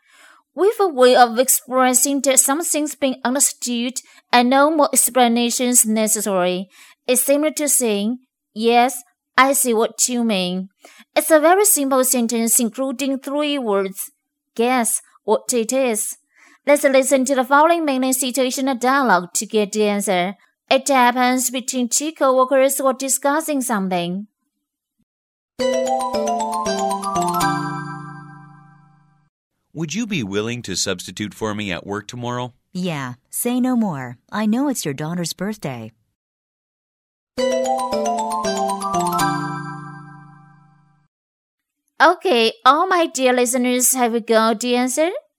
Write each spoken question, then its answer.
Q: Guess what it is.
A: Say no more.